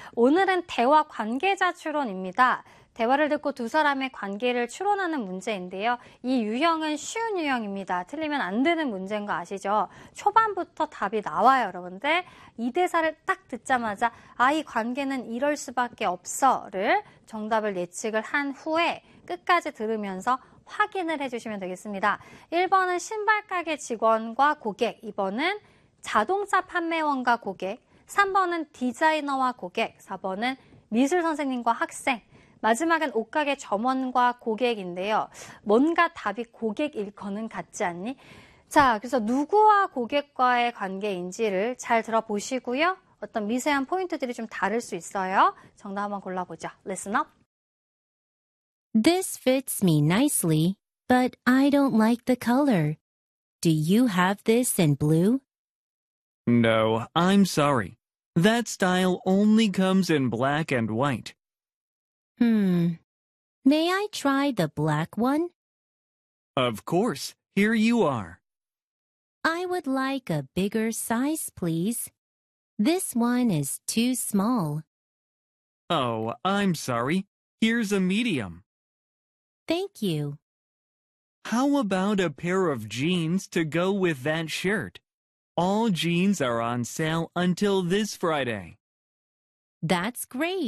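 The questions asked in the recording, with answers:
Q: 대화를 듣고 두 사람의 관계를 추론하는 문제인데요.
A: 5: 옷가게 점원과 고객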